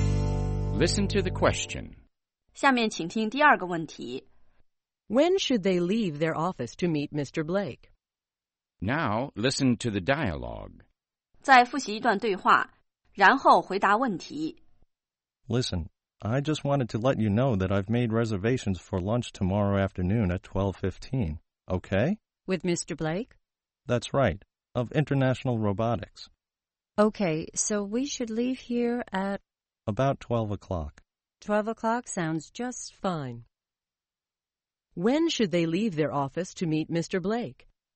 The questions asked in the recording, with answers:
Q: When should they leave their office to meet Mr. Blake?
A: They should leave their office at 12 o'clock.